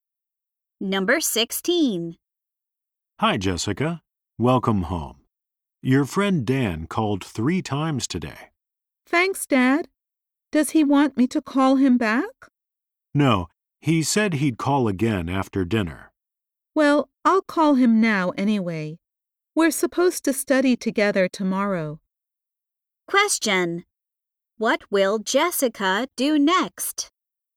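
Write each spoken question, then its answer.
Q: What will Jessica do next?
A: Call Dan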